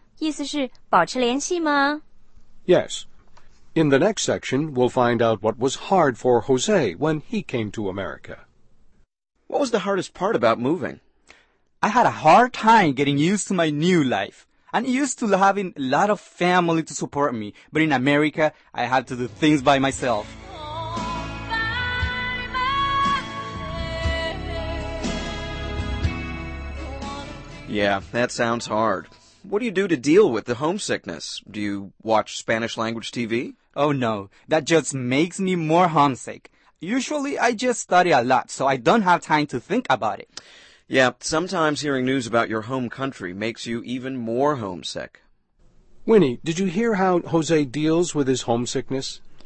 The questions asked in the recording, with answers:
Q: Winnie, did you hear how Jose deals with his homesickness?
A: 他说啊,自己埋头学习,这样就没有时间想家了。